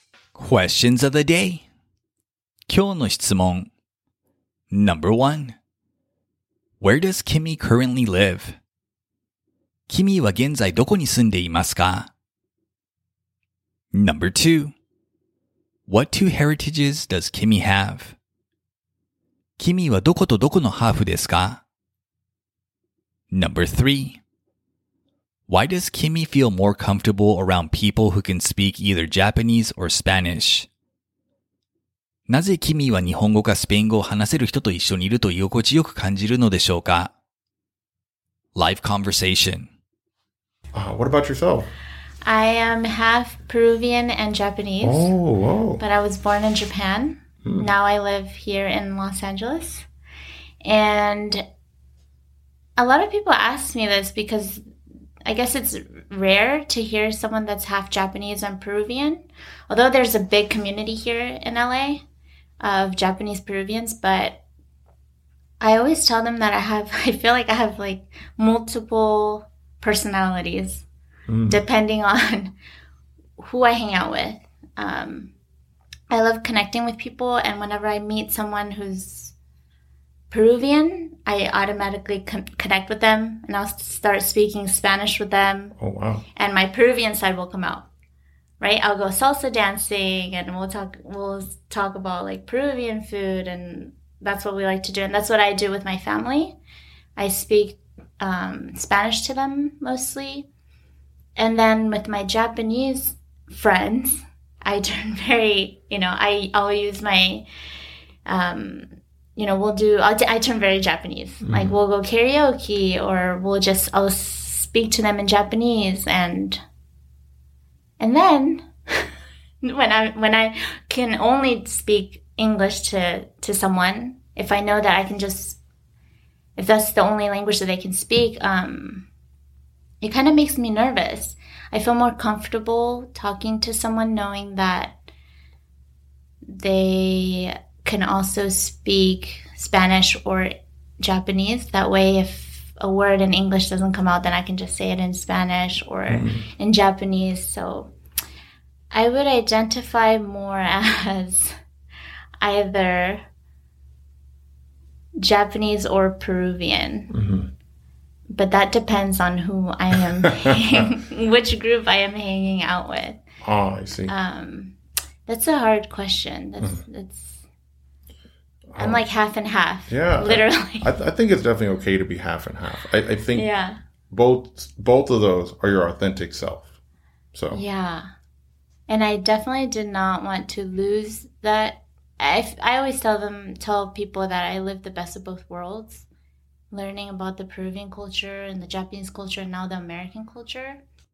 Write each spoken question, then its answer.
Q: Where does Kimmy currently live?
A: She lives in Los Angeles, California.

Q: What two heritages does Kimmy have?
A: She is half Japanese and half Peruvian.

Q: Why does Kimmy feel more comfortable around people who can speak either Japanese or Spanish?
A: She feels more comfortable around Japanese and Spanish speakers because if she can't communicate something in English, she knows she can communicate it in either of those languages.